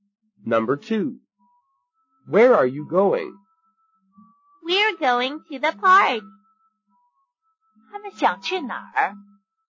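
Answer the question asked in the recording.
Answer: 公园 (the park)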